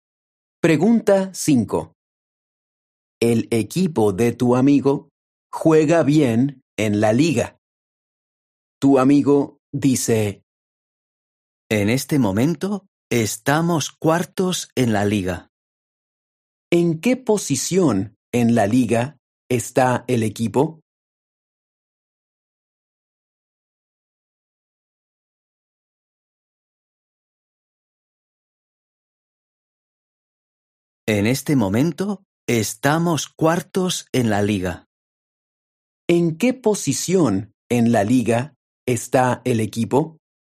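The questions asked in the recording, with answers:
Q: ¿En qué posición en la liga está el equipo?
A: Cuarto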